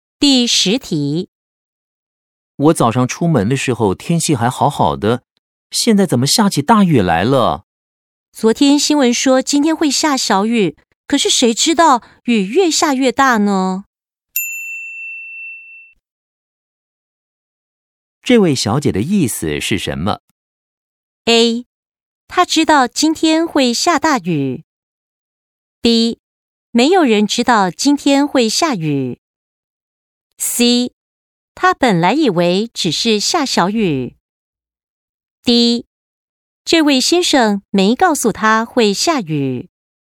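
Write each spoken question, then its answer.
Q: 这位小姐的意思是什么?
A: C: 他本来以为只是下小雨。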